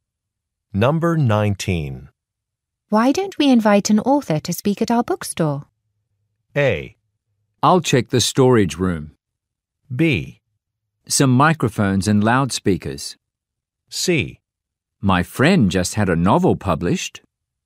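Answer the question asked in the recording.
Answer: C: My friend just had a novel published.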